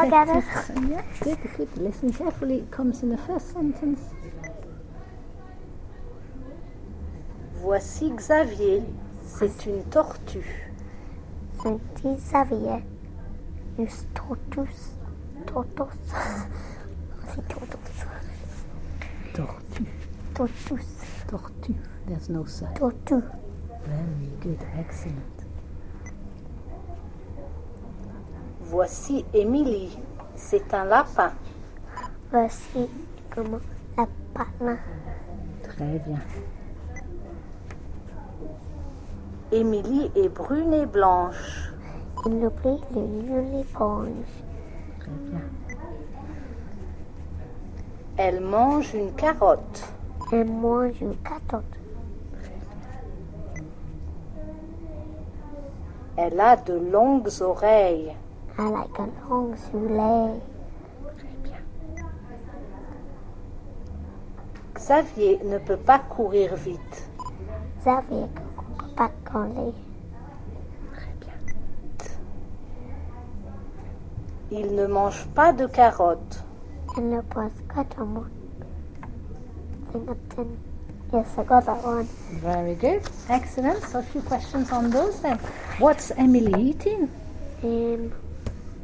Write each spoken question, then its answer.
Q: What's Emily eating?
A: Carrot.